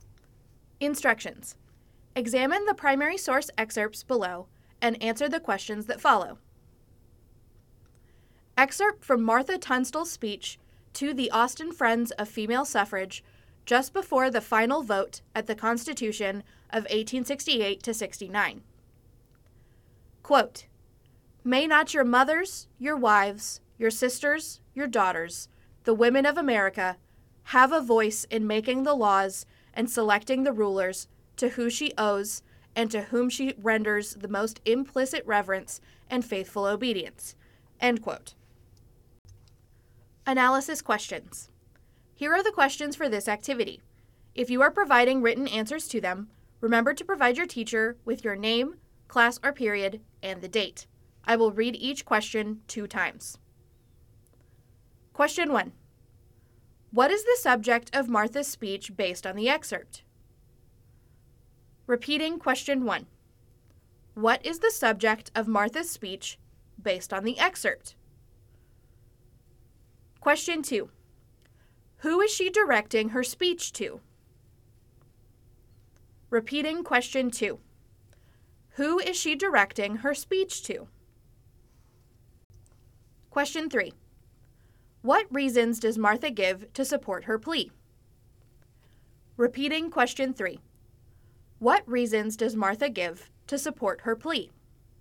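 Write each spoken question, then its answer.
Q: What is the subject of Martha's speech based on the excerpt?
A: Women's suffrage: giving women a voice in making laws and choosing rulers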